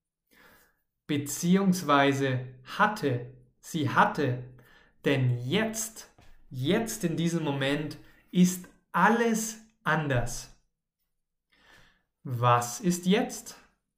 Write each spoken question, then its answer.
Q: Was ist jetzt?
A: Alles ist anders.